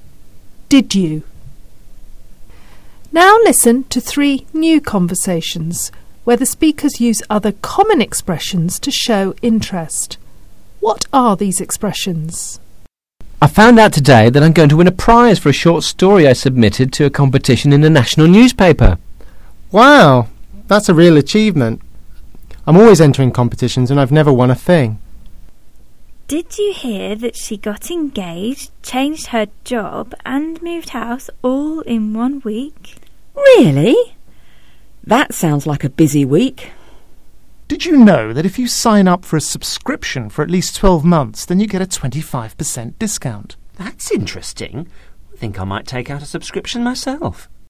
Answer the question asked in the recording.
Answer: Wow.